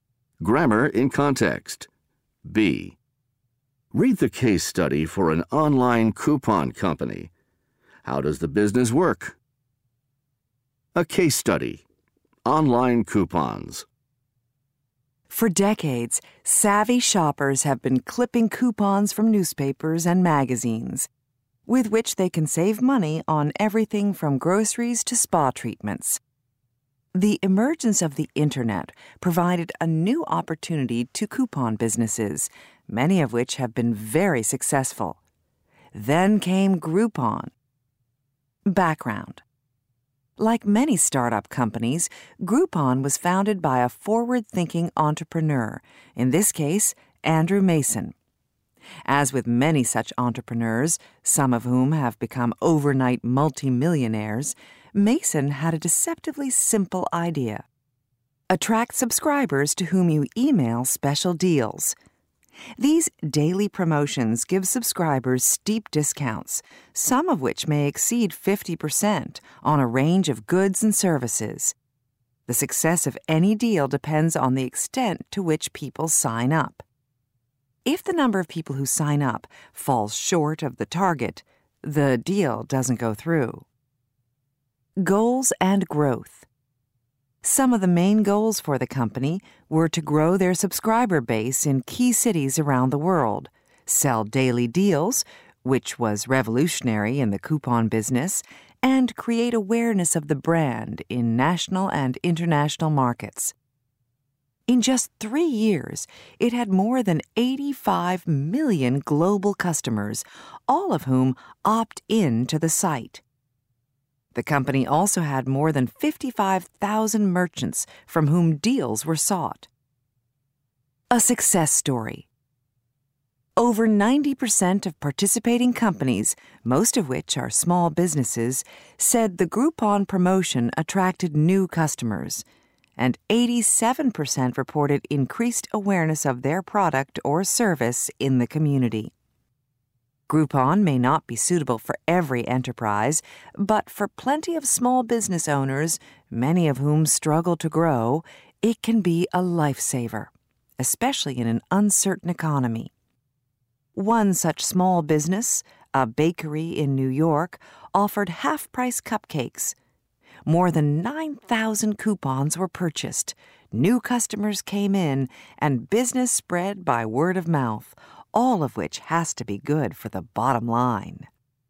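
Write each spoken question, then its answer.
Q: How does the business work?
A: It emails subscribers daily deals with steep discounts; a deal goes through only if enough people sign up.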